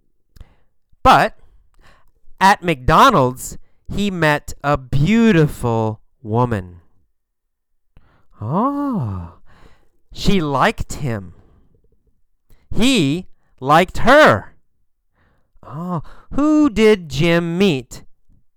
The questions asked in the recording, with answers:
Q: Oh, who did Jim meet?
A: Jim met a beautiful woman.